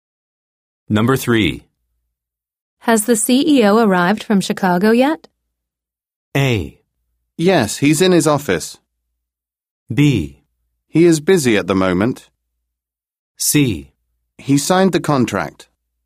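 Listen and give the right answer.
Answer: A: Yes, he's in his office.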